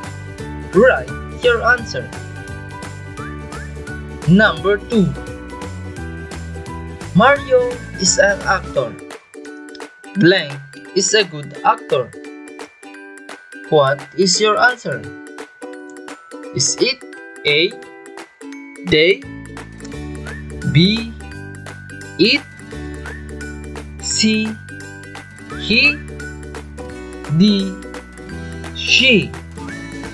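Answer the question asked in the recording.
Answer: C: He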